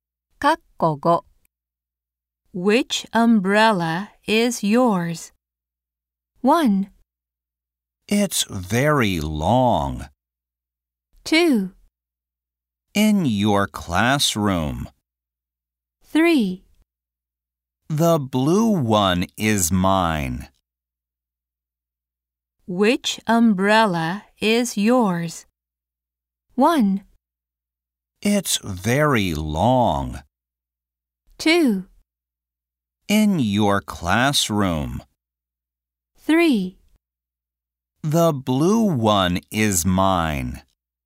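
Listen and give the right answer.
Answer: 3: The blue one is mine.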